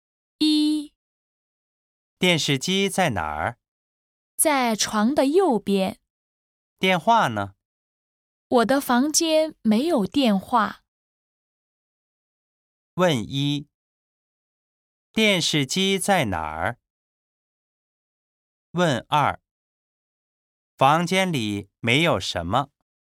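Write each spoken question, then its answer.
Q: 电视机在哪儿?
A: 在床的右边

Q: 房间里没有什么。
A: 电话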